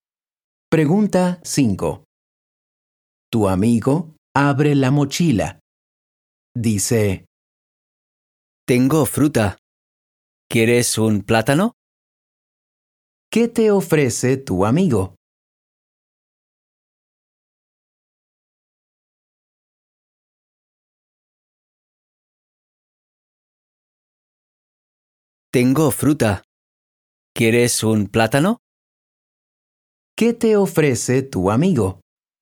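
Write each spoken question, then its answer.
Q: ¿Qué te ofrece tu amigo?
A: Un plátano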